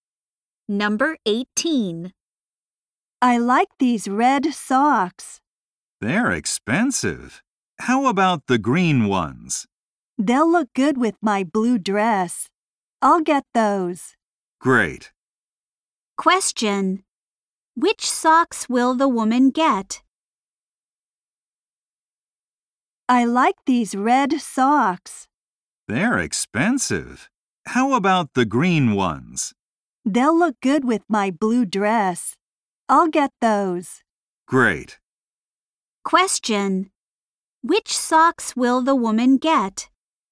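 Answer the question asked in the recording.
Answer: The green ones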